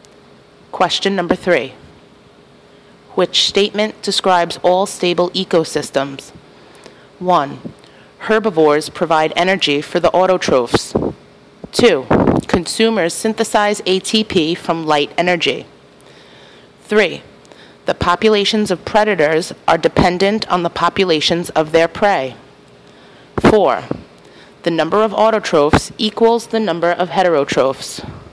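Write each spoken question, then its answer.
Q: Which statement describes all stable ecosystems?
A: 3: The populations of predators are dependent on the populations of their prey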